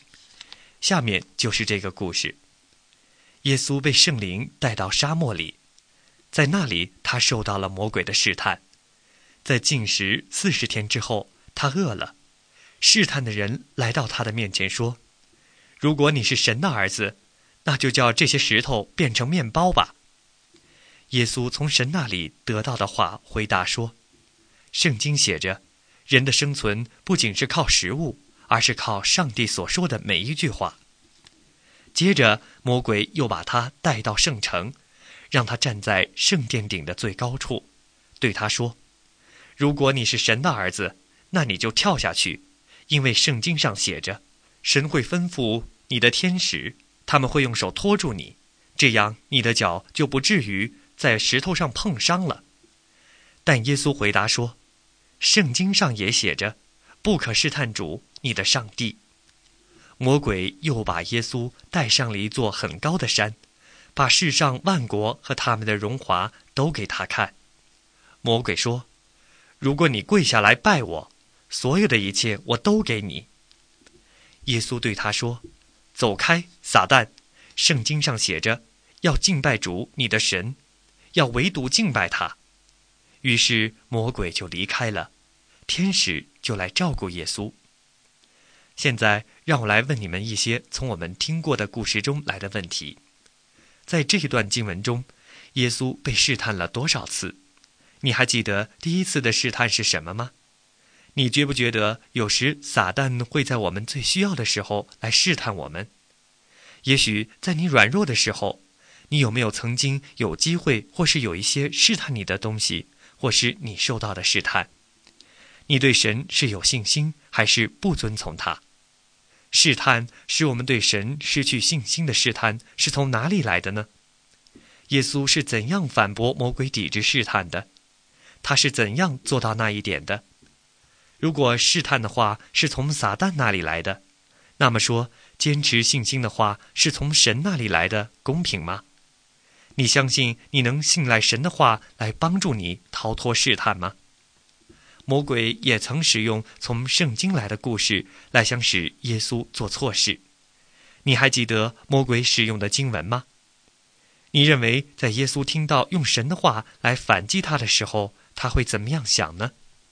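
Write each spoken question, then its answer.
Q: 在这一段经文中,耶稣被试探了多少次?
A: 三次

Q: 你还记得第一次的试探是什么吗?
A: 叫石头变成面包

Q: 耶稣是怎样反驳魔鬼抵制试探的?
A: 引用圣经(神的话)

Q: 你还记得魔鬼使用的经文吗?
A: 神会吩咐天使用手托住你,免得你的脚在石头上碰伤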